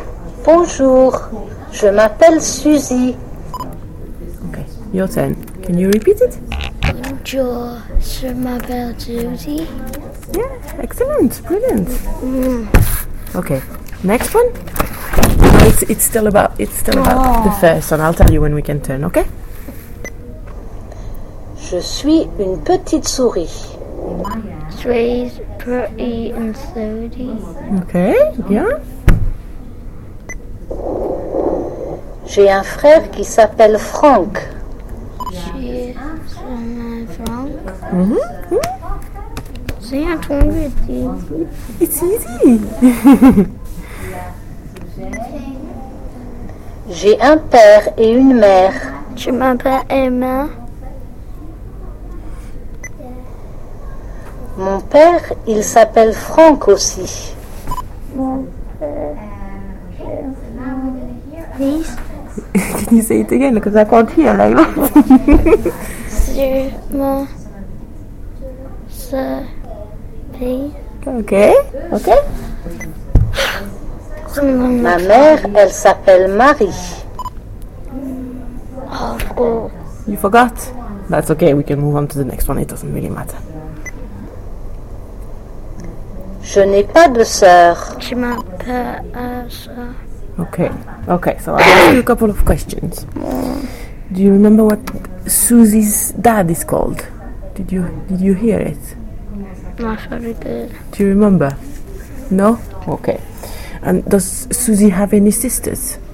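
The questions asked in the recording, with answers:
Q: Do you remember what Susie's dad is called?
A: Franck

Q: And does Susie have any sisters?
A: No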